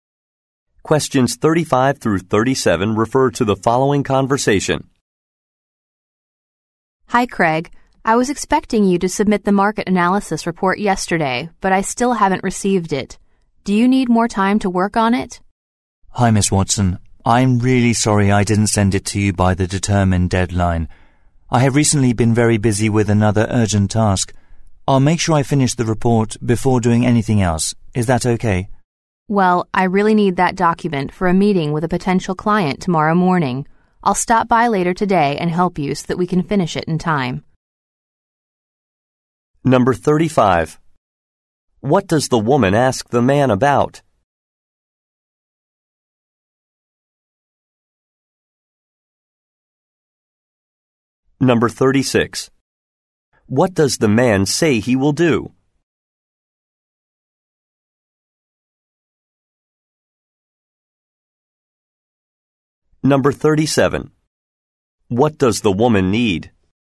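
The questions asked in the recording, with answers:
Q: What does the woman ask the man about?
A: The overdue market analysis report

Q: What does the man say he will do?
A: Finish the report before anything else

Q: What does the woman need?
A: The report for a client meeting tomorrow morning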